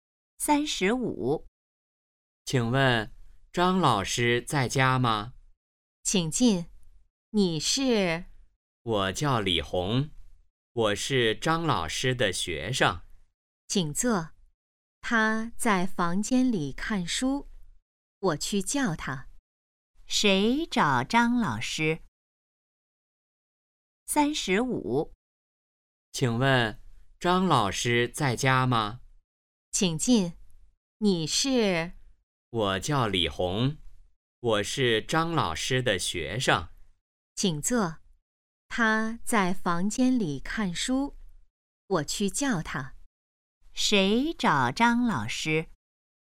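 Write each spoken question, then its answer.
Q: 谁找张老师?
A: 李红(张老师的学生)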